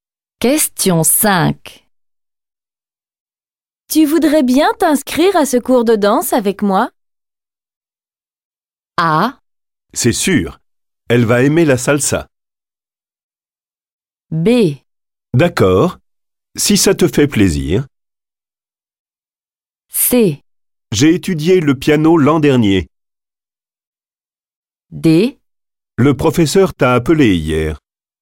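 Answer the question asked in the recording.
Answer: B: D'accord, si ça te fait plaisir.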